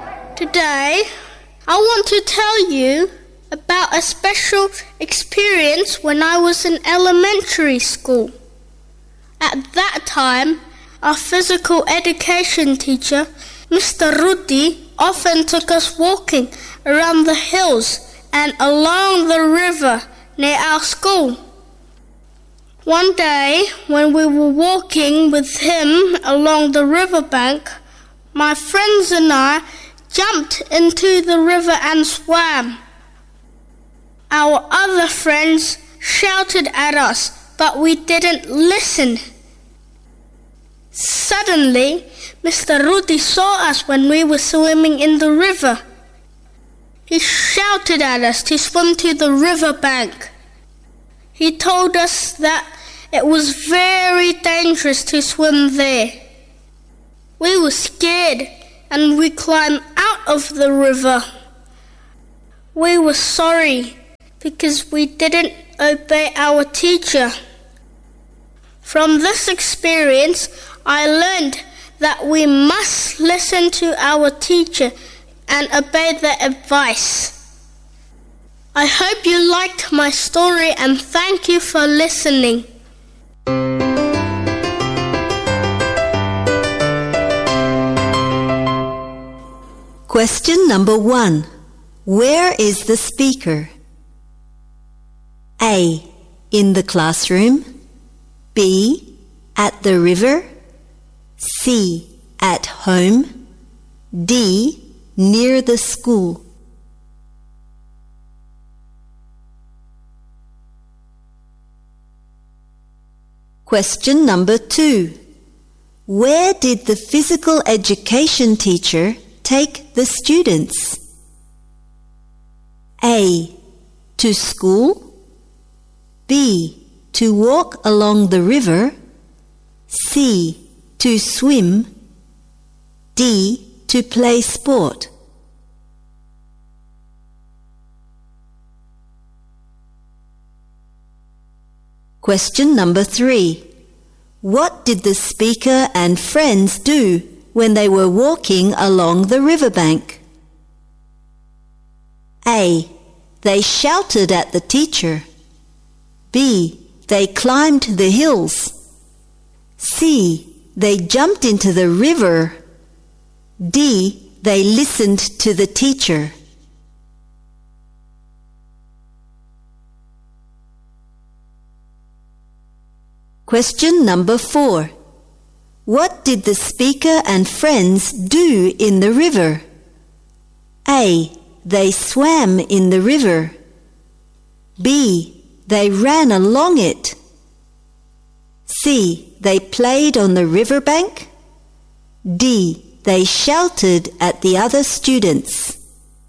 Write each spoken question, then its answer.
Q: Where did the physical education teacher take the students?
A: B. To walk along the river.

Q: What did the speaker and friends do when they were walking along the riverbank?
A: C. They jumped into the river.

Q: What did the speaker and friends do in the river?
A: A. They swam in the river.